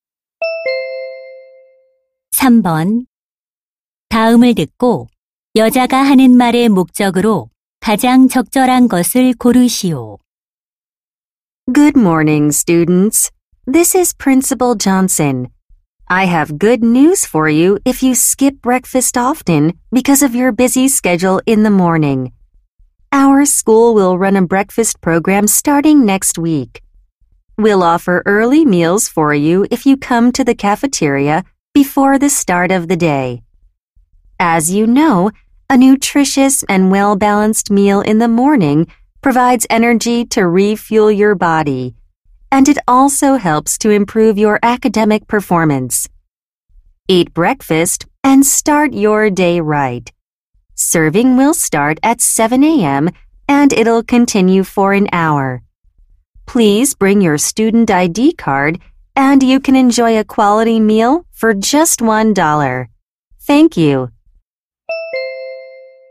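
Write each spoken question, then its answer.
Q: 다음을 듣고 여자가 하는 말의 목적으로 가장 적절한 것을 고르시오.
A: 학교 아침 식사 프로그램 시행을 알리려고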